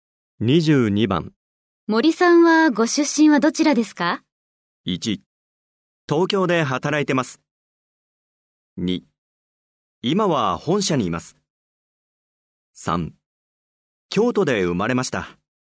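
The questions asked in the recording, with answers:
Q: 森さんはご出身はどちらですか?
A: 3: 京都で生まれました。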